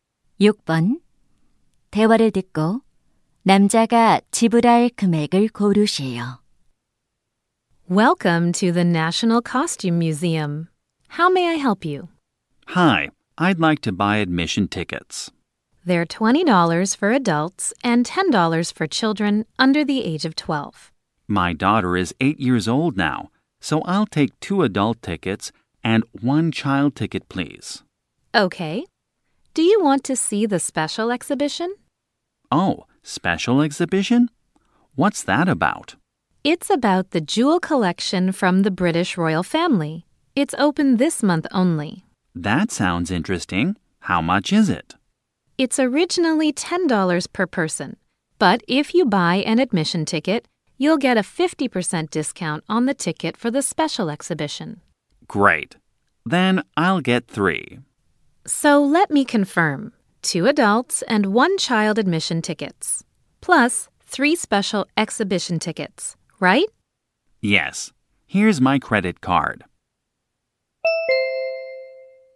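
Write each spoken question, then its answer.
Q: 대화를 듣고 남자가 지불할 금액을 고르시오.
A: $65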